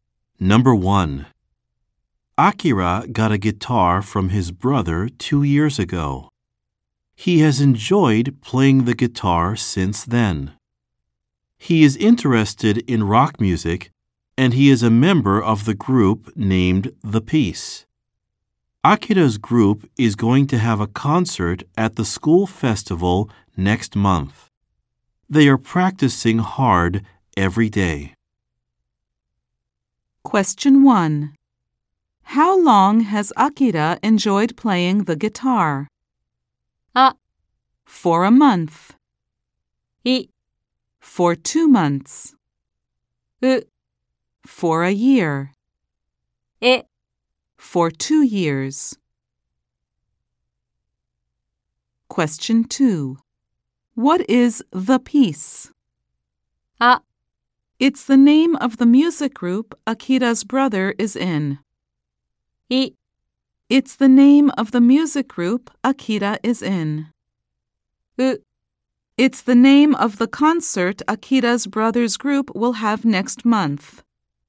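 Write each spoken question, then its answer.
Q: How long has Akira enjoyed playing the guitar?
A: E: For 2 years.

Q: What is The Peace?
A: I: It's the name of the music group Akira is in.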